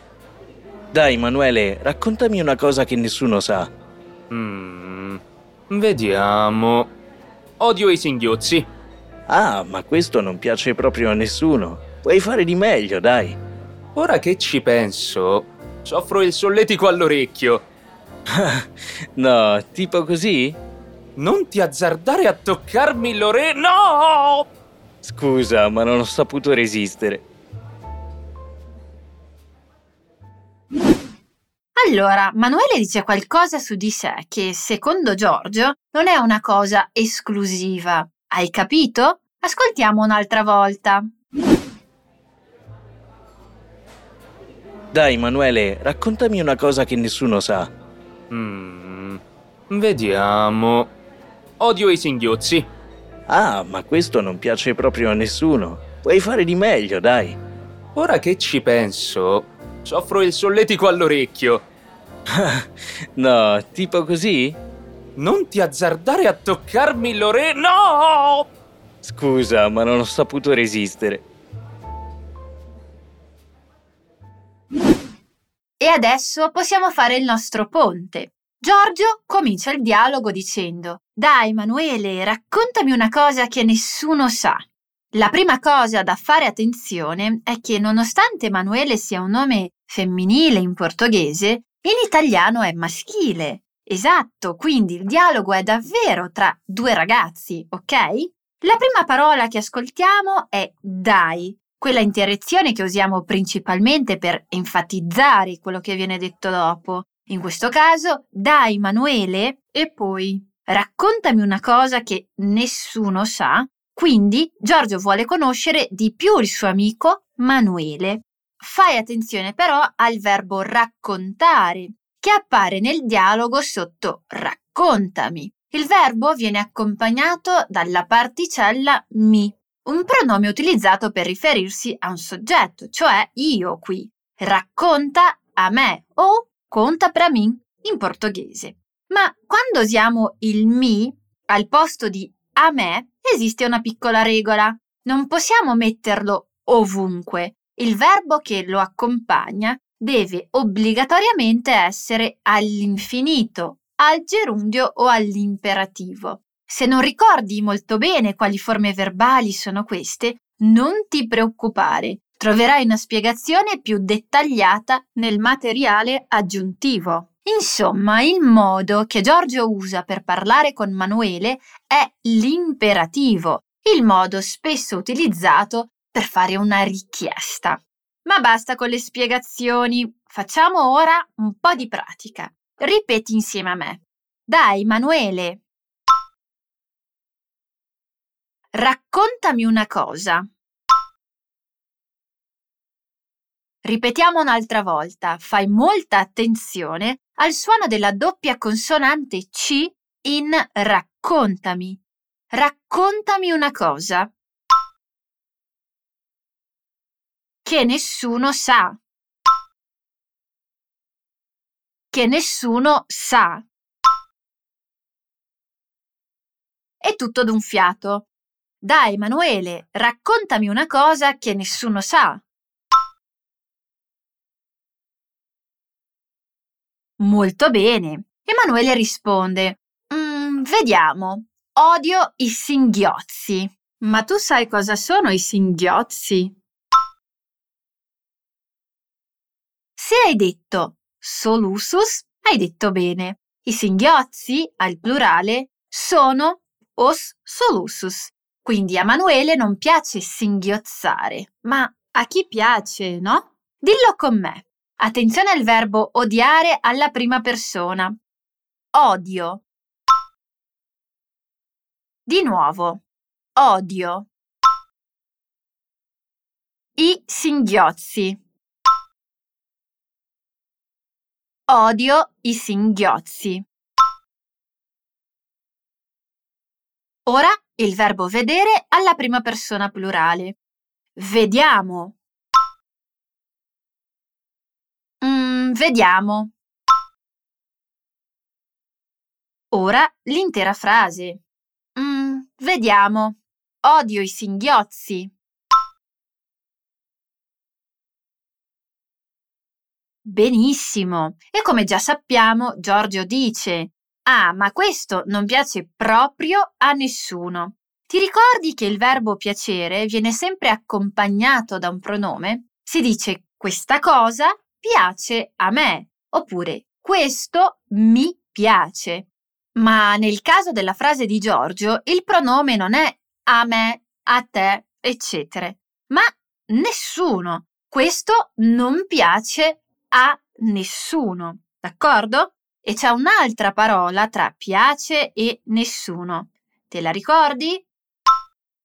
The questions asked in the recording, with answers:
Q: E c'è un'altra parola tra piace e nessuno. Te la ricordi?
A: è proprio